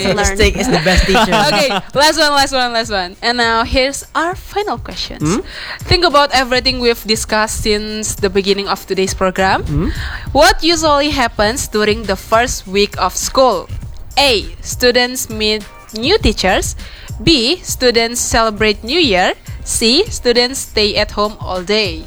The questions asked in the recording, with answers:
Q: What usually happens during the first week of school?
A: Okay, meet new teachers. Yes, not new year.